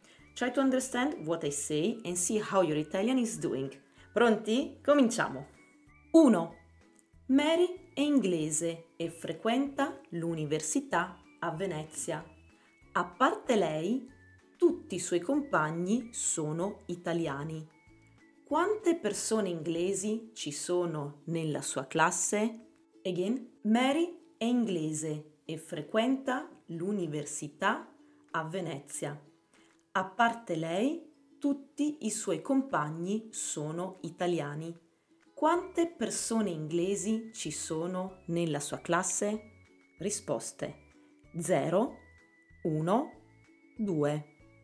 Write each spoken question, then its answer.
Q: Quante persone inglesi ci sono nella sua classe?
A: 1. Solo Mary.